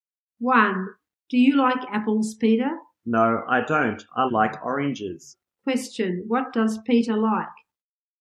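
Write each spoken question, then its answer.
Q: What does Peter like?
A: Oranges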